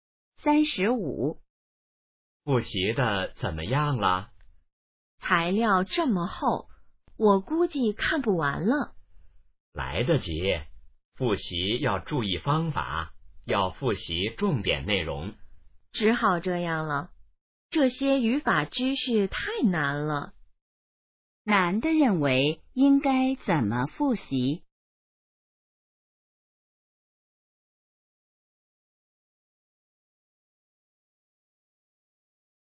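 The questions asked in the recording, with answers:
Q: 男的认为应该怎么复习?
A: 复习重点内容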